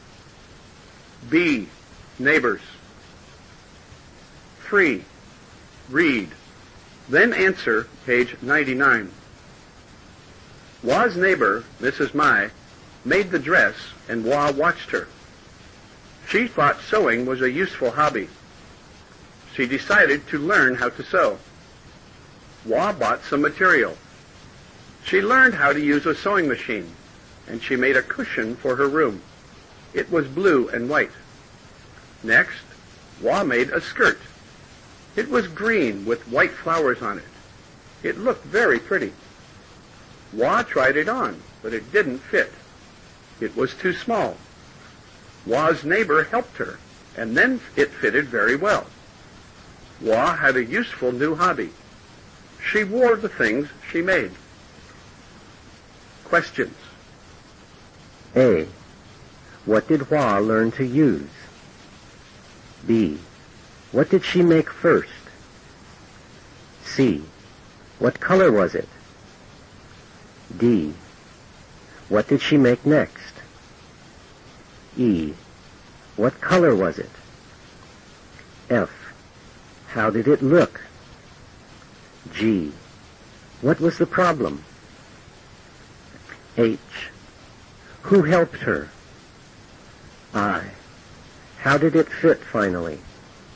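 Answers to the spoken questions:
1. A sewing machine
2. A cushion for her room
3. Blue and white
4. A skirt
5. Green with white flowers on it
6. Very pretty
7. It didn't fit; it was too small
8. Her neighbor, Mrs. Mai
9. Very well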